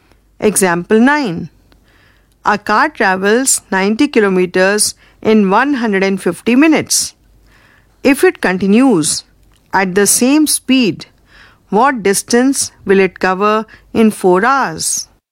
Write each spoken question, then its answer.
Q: If it continues at the same speed, what distance will it cover in 4 hours?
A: The distance covered by the car in 4 hours is 144 kilometers.